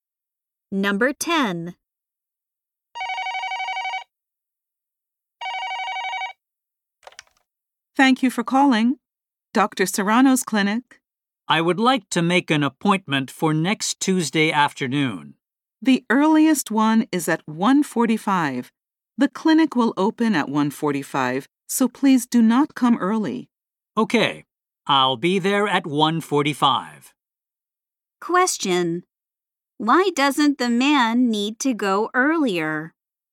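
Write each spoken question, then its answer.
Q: Why doesn't the man need to go earlier?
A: The clinic opens at 1:45, so he shouldn't come early.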